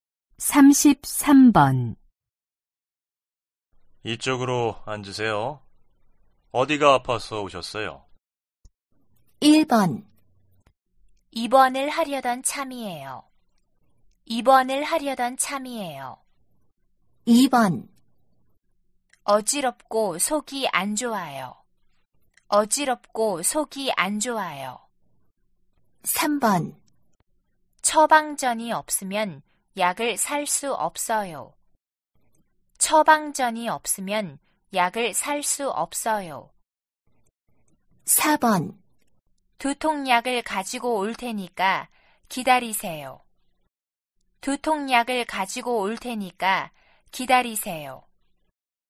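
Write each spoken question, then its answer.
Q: 이쪽으로 앉으세요. 어디가 아파서 오셨어요?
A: 2: 어지럽고 속이 안 좋아요.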